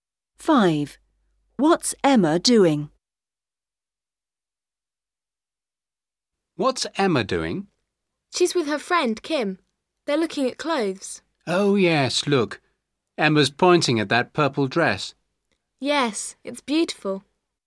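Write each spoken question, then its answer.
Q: What's Emma doing?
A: Pointing at a purple dress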